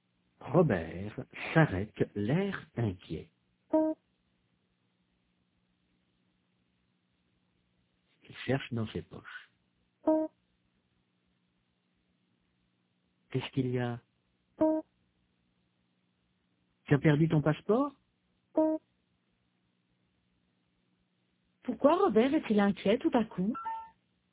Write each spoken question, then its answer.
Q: Pourquoi Robert est-il inquiet tout à coup?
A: Parce qu'il n'a pas son passeport.